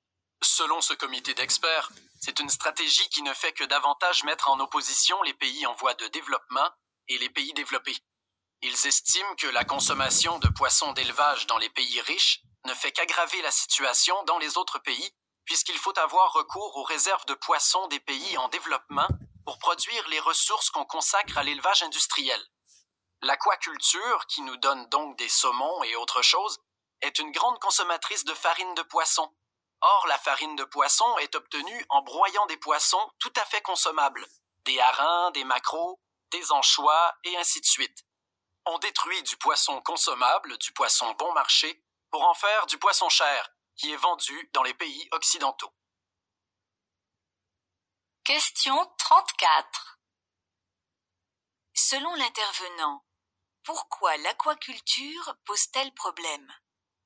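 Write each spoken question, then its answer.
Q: Selon l'intervenant, pourquoi l'aquaculture pose-t-elle problème ?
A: Elle détruit du poisson consommable et bon marché des pays en développement pour produire du poisson cher vendu dans les pays riches.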